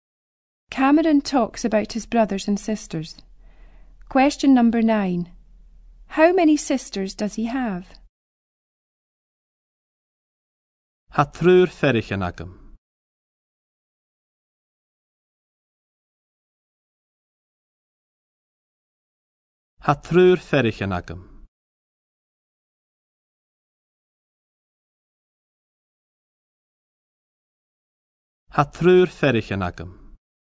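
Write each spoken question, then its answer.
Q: How many sisters does he have?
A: Three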